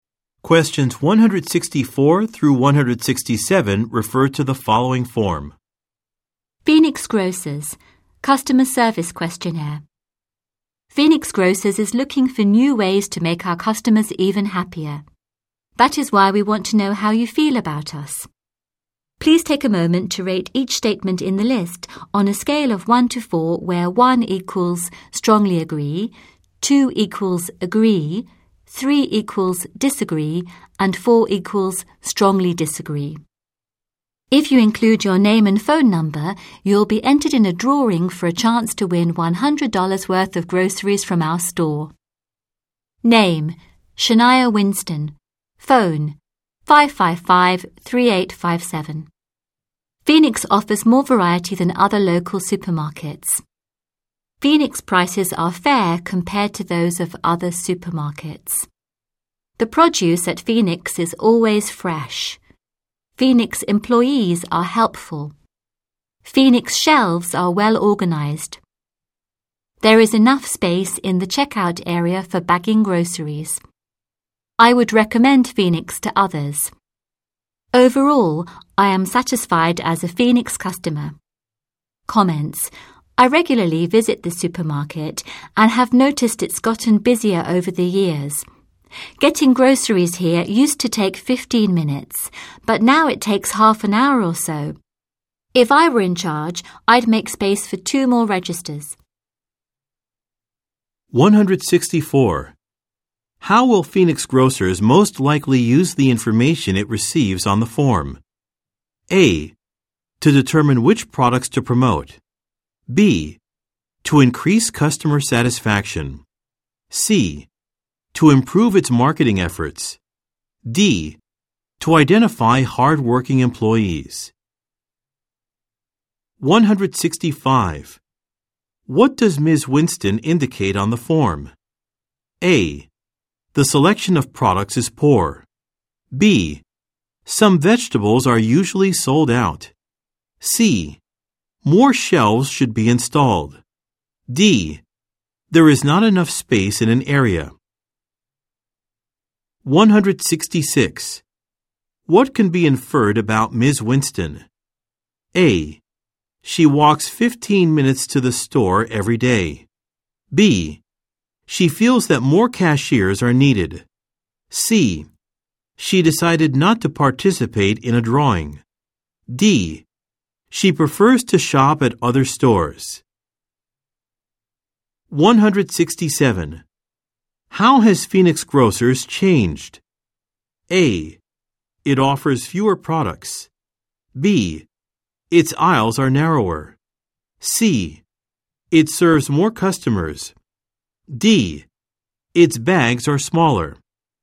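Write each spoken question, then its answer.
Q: How will Phoenix grocers most likely use the information it receives on the form?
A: B: To increase customer satisfaction.

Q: What can be inferred about Ms. Winston?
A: B: She feels that more cashiers are needed.

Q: How has Phoenix Grocers changed?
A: C: It serves more customers.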